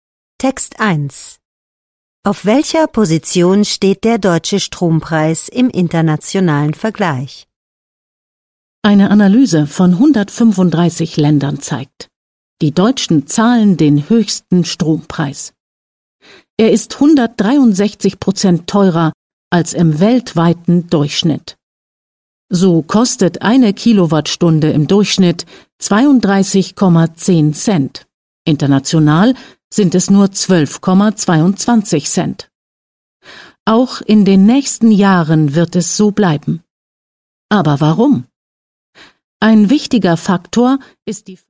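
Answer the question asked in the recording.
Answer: Auf Platz 1 (höchster Strompreis)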